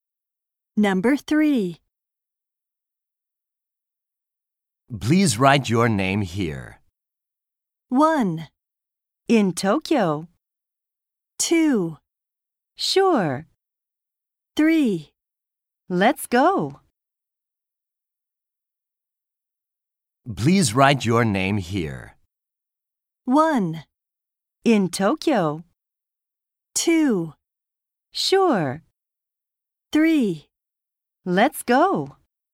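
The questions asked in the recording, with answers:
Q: Please write your name here.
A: 2: Sure.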